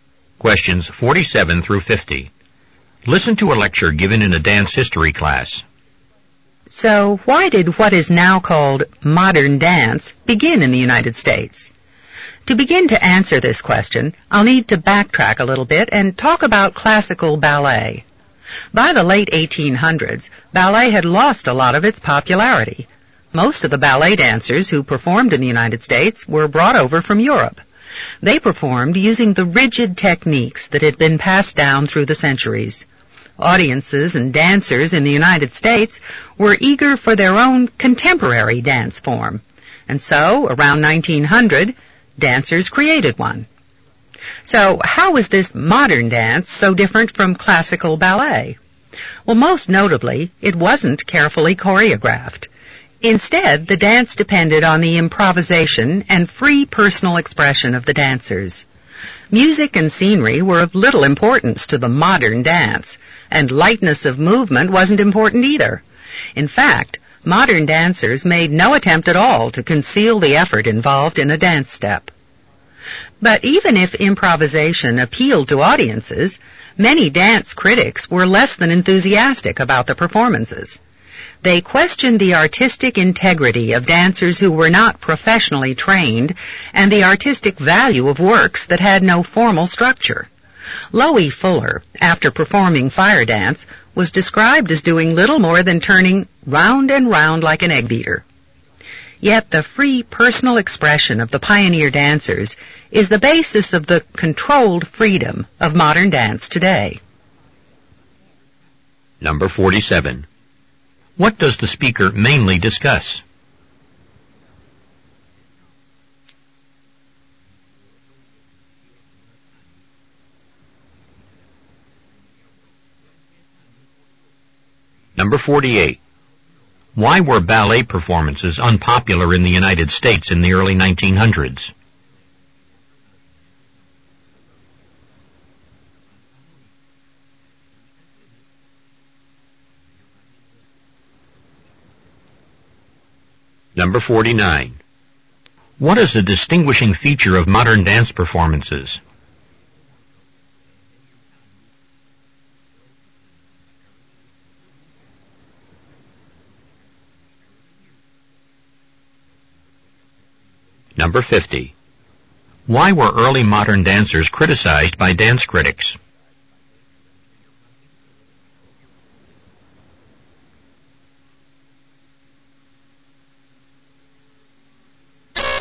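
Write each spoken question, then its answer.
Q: What does the speaker mainly discuss?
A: The origins of modern dance in the United States

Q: Why were ballet performances unpopular in the United States in the early 1900s?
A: They used rigid European techniques; audiences wanted a contemporary dance form

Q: What is a distinguishing feature of modern dance performances?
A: Improvisation and free personal expression

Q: Why were early modern dancers criticized by dance critics?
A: They weren't professionally trained and their works had no formal structure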